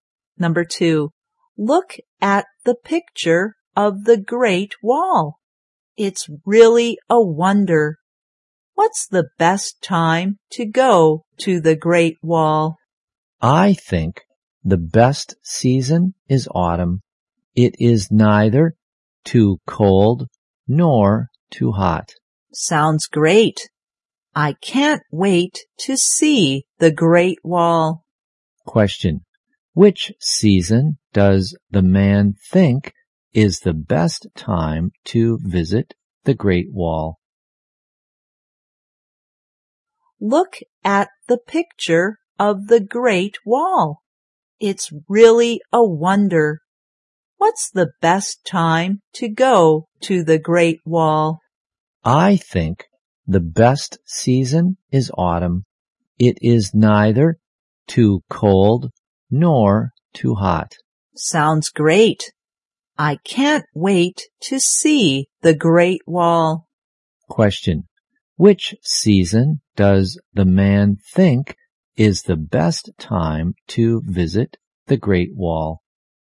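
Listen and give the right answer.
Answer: Autumn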